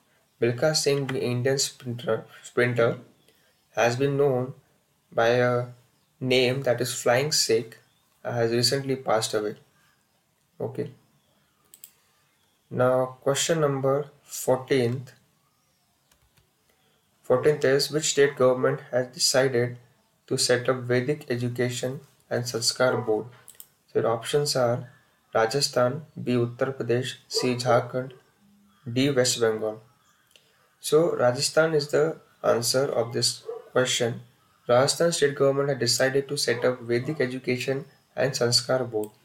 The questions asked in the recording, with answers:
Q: which state government has decided to set up Vedic education and Sanskar board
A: so Rajasthan is the answer of this question